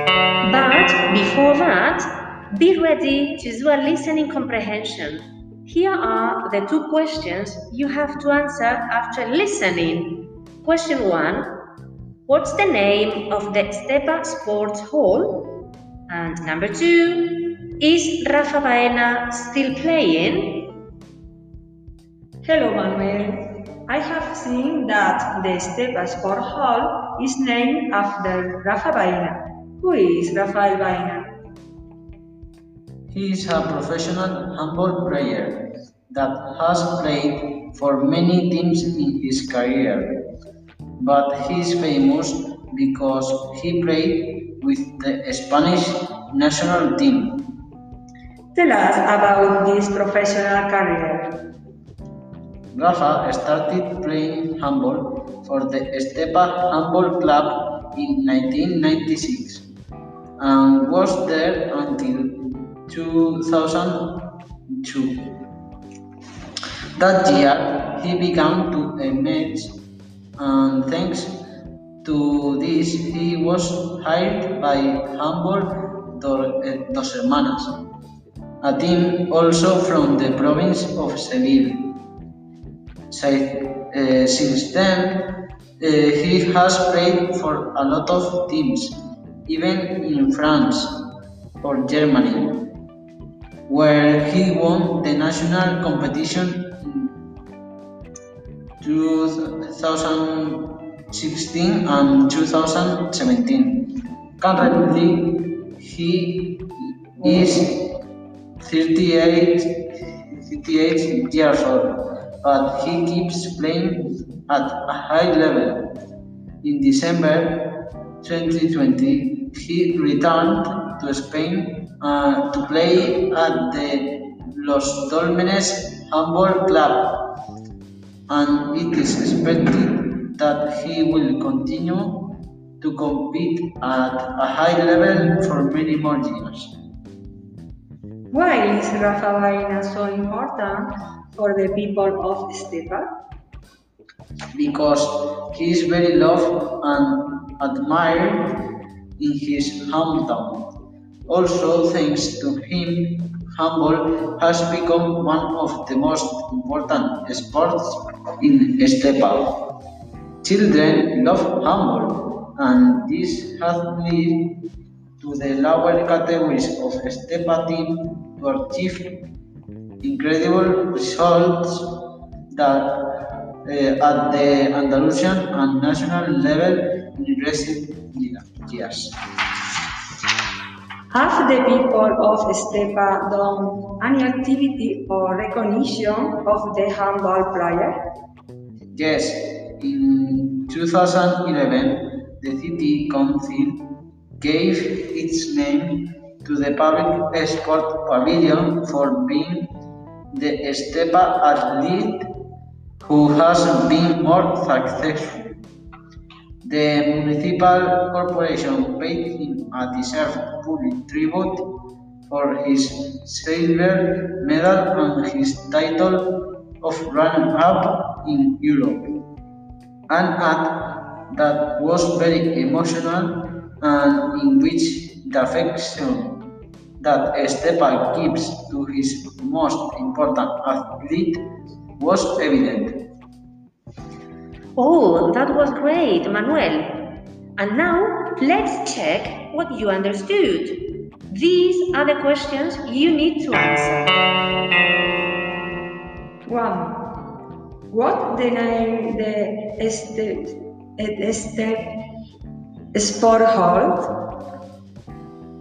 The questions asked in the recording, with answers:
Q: What's the name of the Estepa Sports Hall?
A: The name of the Estepa Sport Hall is Rafa Baena.

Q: Is Rafa Baena still playing?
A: Yes, he plays for a Spanish team in this year.